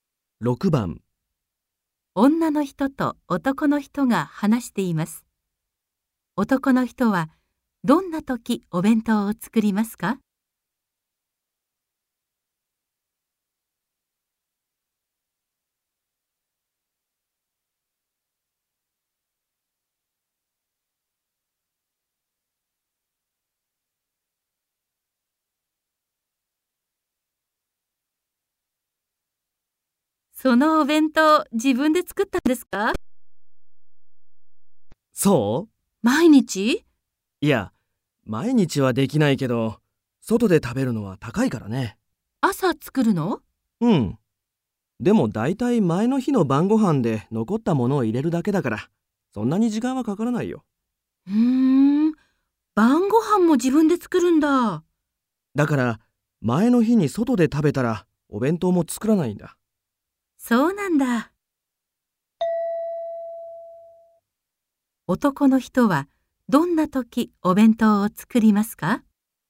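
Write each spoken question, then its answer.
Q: 男の人はどんな時お弁当を作りますか?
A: 前の日に晩ご飯を自分で作った時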